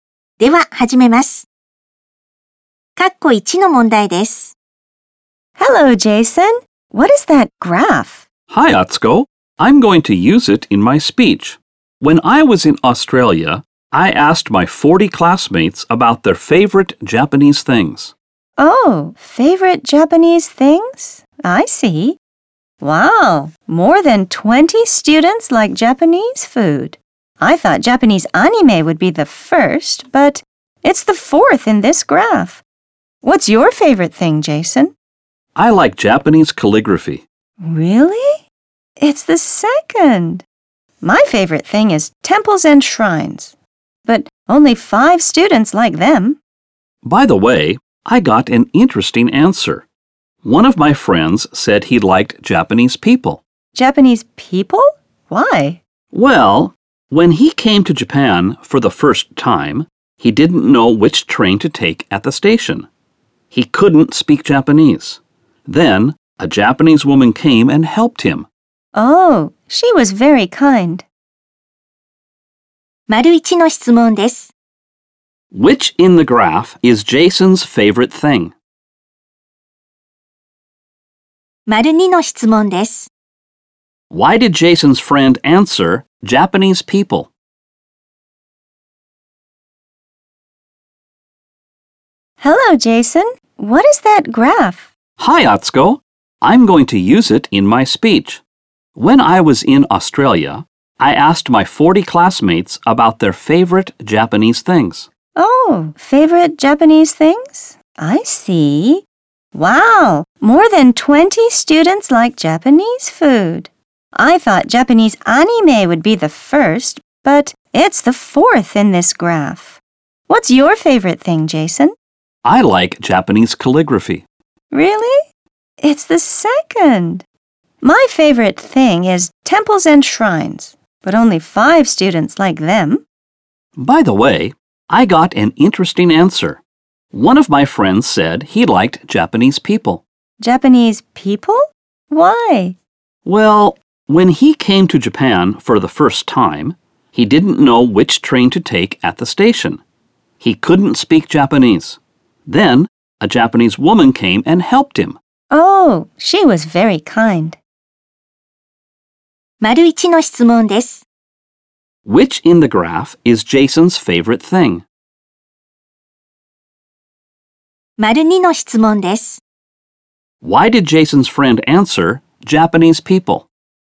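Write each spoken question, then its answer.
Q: Which in the graph is Jason's favorite thing?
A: Japanese calligraphy

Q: Why did Jason's friend answer Japanese people?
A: Because a Japanese woman helped him at the station when he didn't know which train to take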